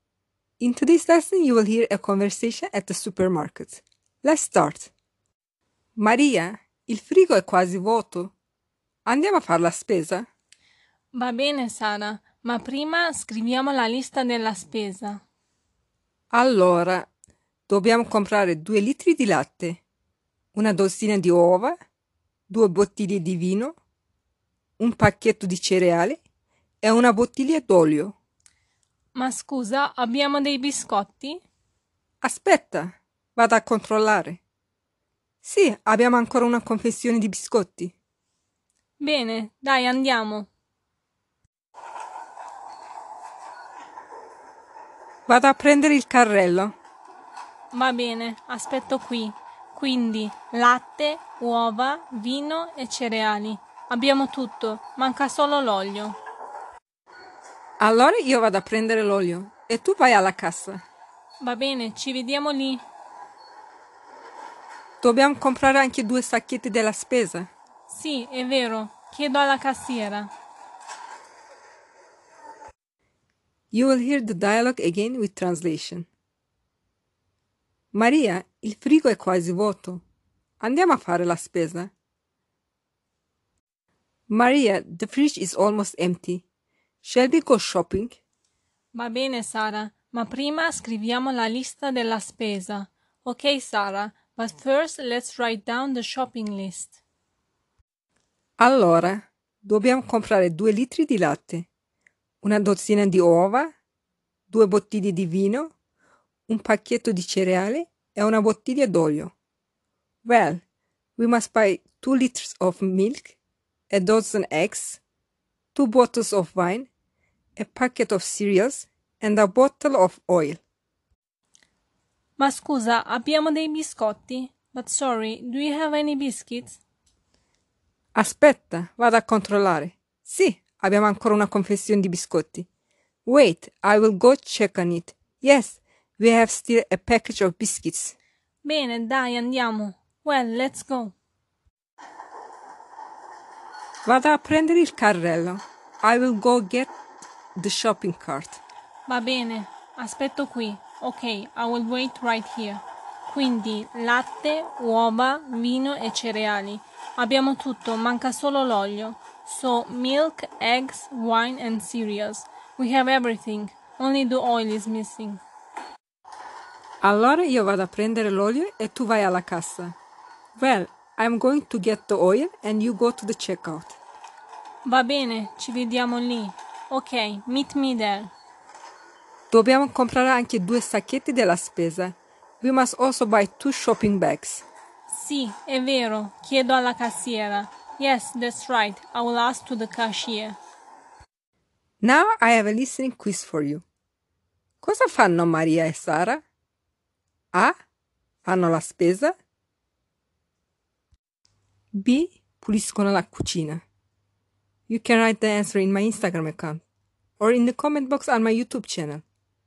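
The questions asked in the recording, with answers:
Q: Cosa fanno Maria e Sara?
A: A: Fanno la spesa.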